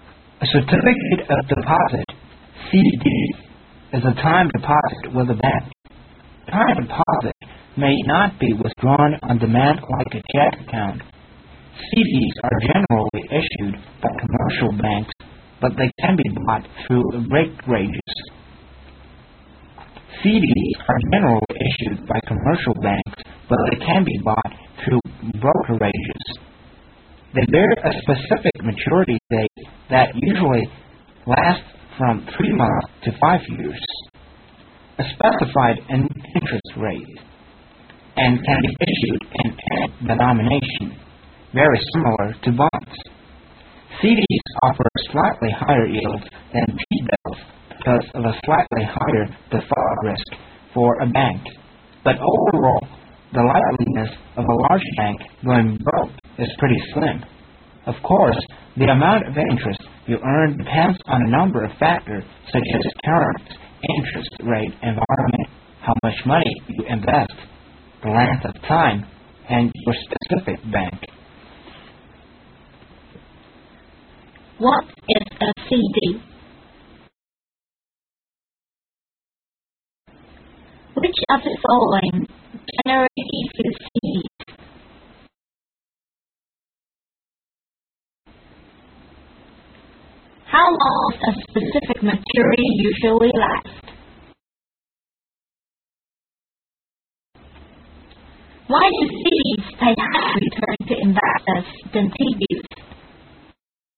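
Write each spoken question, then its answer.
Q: What is a CD?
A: A time deposit with a bank

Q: How long does a specific maturity usually last?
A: From 3 months to 5 years

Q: Why do CDs pay higher return to investors than T-bills?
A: Because of a slightly higher default risk for a bank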